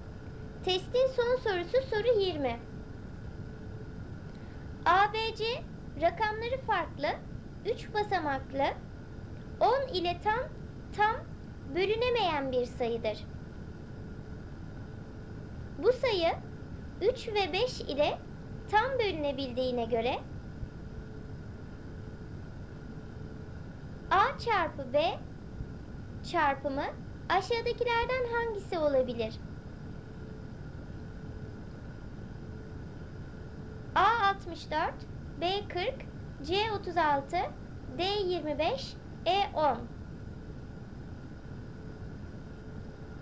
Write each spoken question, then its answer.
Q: A çarpı B çarpımı aşağıdakilerden hangisi olabilir?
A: Doğru cevap C 36.